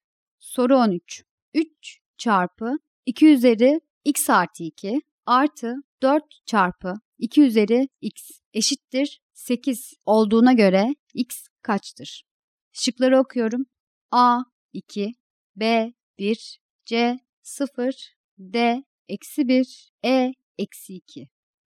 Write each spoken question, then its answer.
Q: 3 çarpı 2 üzeri x artı 2 artı 4 çarpı 2 üzeri x eşittir 8 olduğuna göre x kaçtır?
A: Doğru cevap D şıkkı.